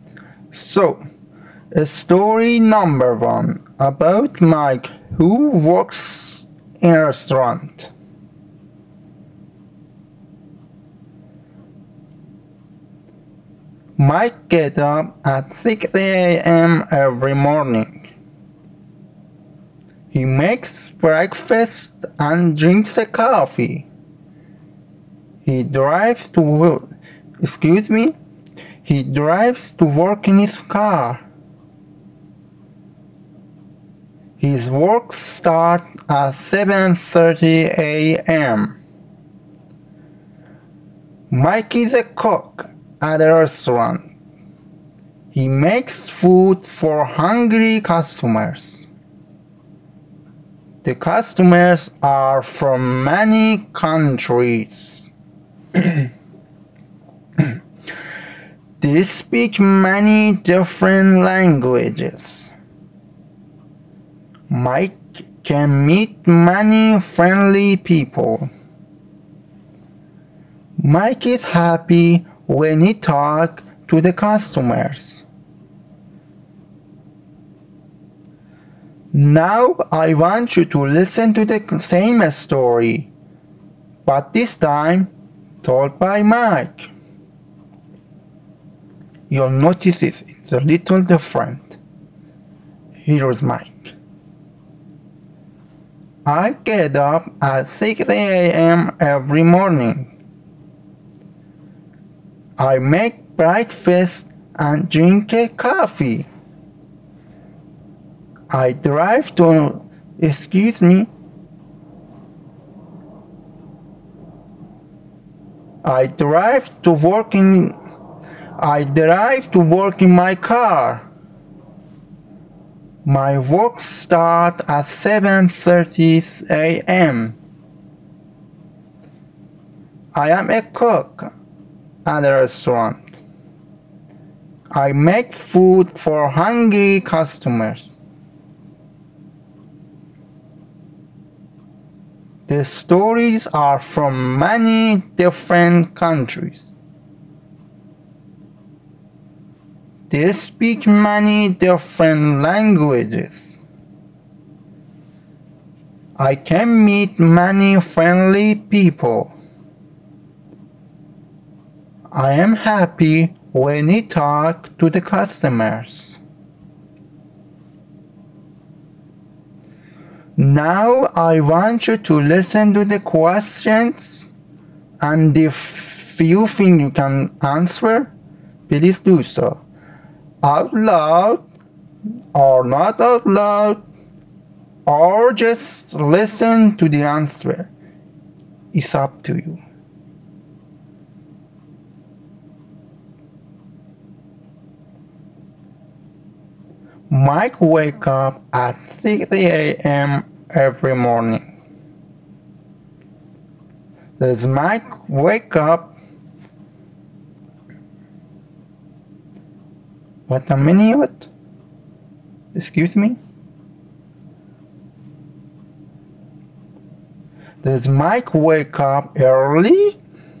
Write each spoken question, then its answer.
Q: Does Mike wake up early?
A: Yes, Mike wakes up at 6 a.m.